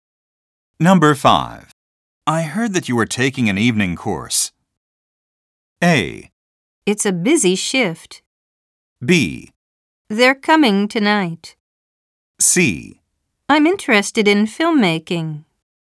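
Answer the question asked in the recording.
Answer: C: I'm interested in filmmaking.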